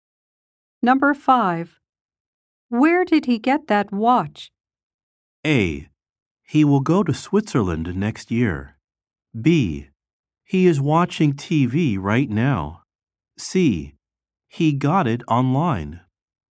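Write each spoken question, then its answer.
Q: Where did he get that watch?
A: C: He got it online.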